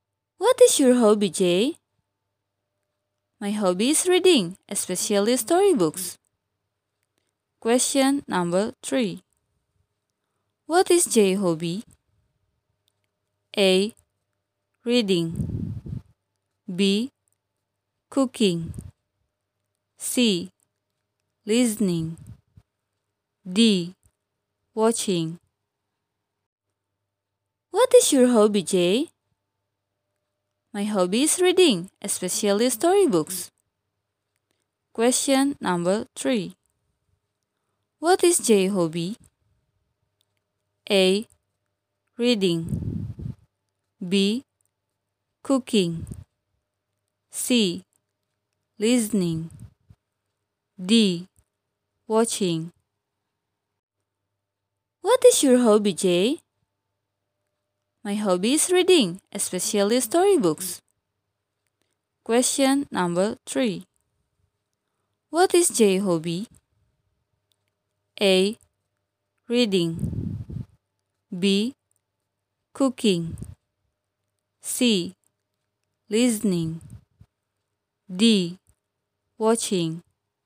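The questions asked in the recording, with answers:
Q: What is Jay's hobby?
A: A: Reading.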